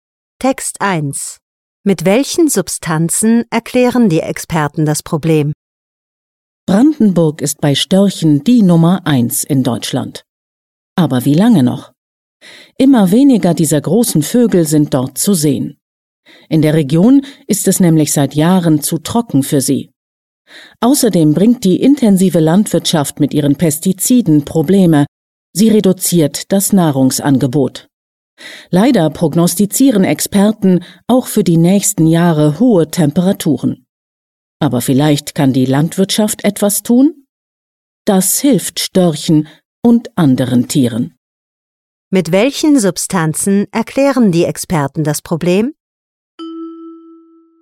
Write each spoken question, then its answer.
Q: Mit welchen Substanzen erklären die Experten das Problem?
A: Experten sagen, Pestizide sind ein großes Problem.